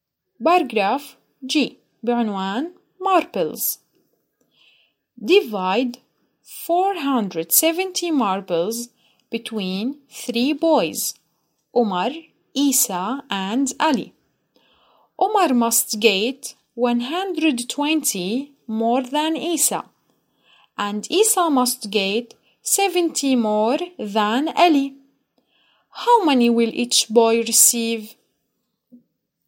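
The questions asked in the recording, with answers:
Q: How many will each boy receive?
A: Umar 260, Isa 140, Ali 70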